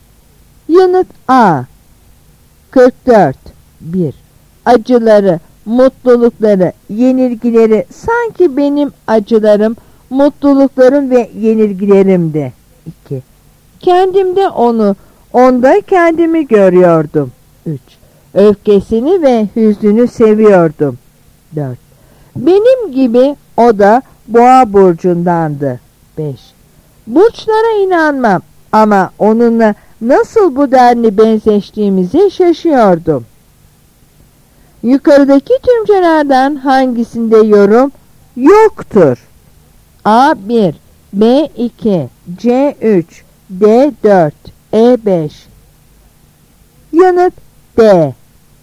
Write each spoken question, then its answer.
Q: Yukarıdaki tümcelerden hangisinde yorum yoktur?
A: Yanıt D.